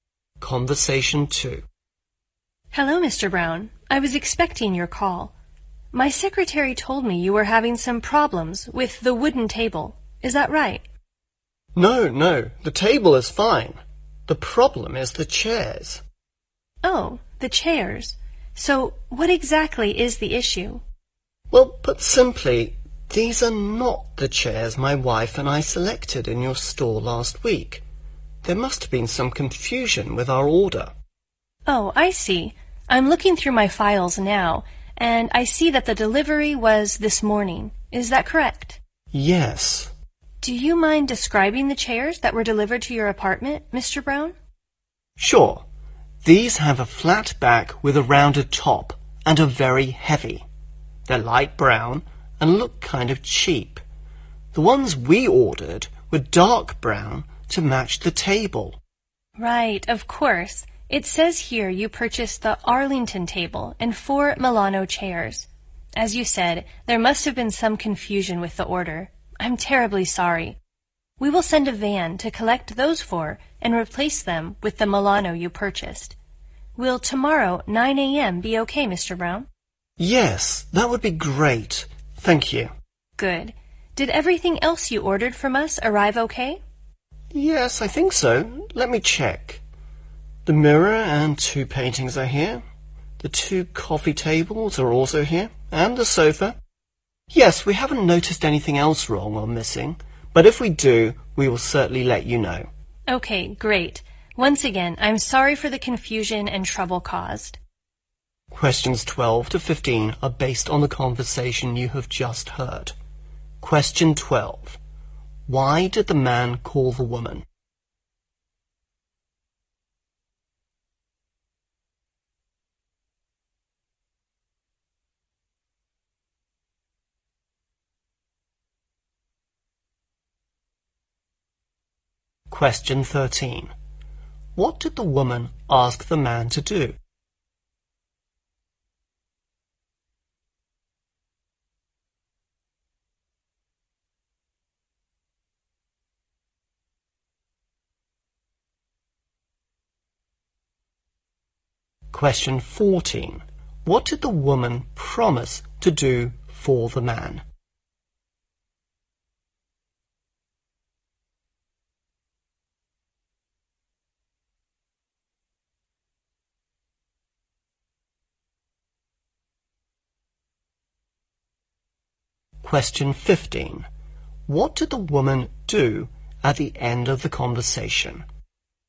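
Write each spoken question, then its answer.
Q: Why did the man call the woman?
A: The wrong chairs were delivered

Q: What did the woman ask the man to do?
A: Describe the chairs that were delivered

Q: What did the woman promise to do for the man?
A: Collect the chairs and replace them with the Milano chairs

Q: What did the woman do at the end of the conversation?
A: She apologized for the confusion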